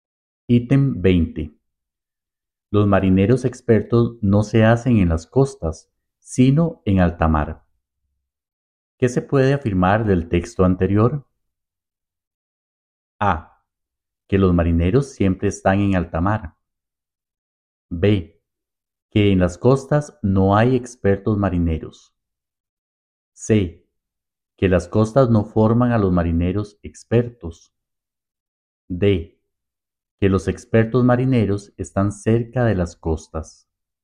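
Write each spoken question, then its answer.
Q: ¿Qué se puede afirmar del texto anterior?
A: C: Que las costas no forman a los marineros expertos.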